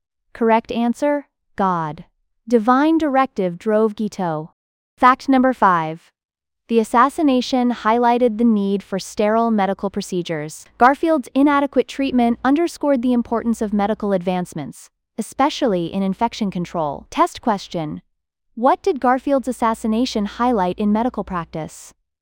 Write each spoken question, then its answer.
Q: What did Garfield's assassination highlight in medical practice?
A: Correct answer. Need for sterile procedures.